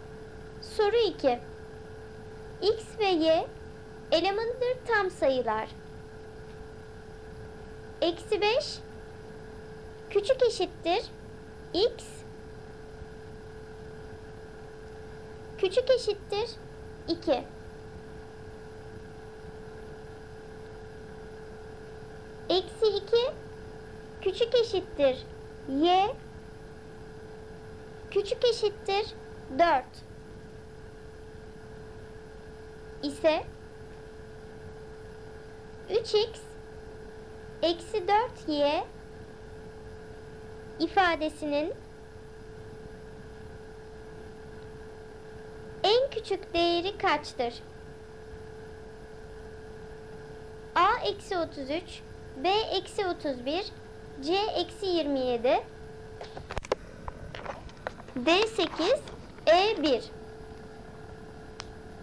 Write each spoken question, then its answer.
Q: en küçük değeri kaçtır?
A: Cevap B eksi 31.